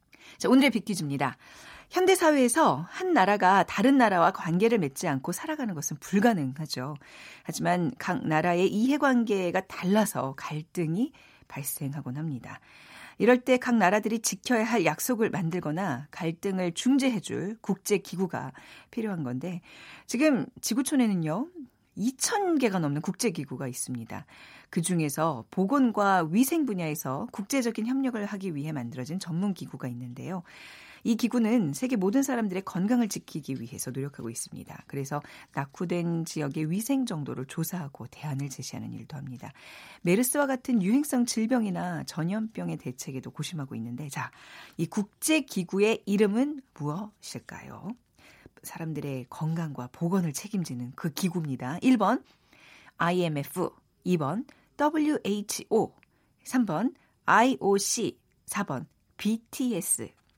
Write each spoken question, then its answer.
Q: 자, 이 국제기구의 이름은 무엇일까요?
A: 빅퀴즈의 정답 WHO 세계보건기구죠.